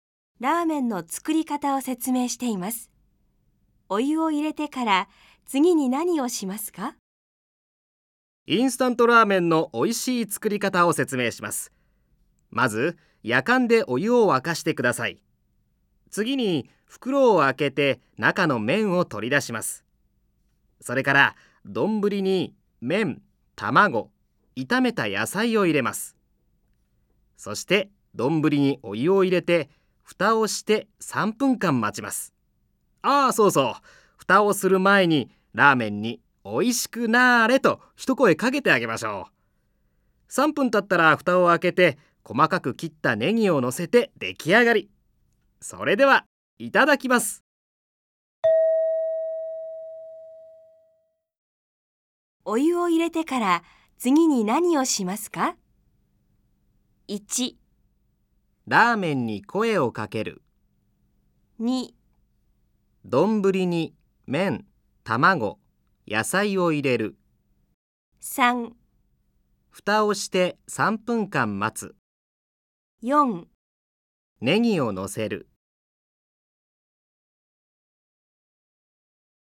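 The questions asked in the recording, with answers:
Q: お湯を入れてから次に何をしますか?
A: 1: ラーメンに声をかける。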